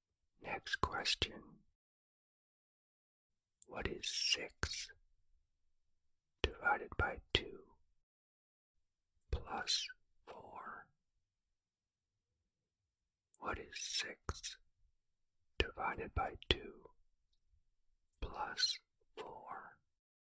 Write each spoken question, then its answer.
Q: What is 6 divided by 2 plus 4?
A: The answer is 7.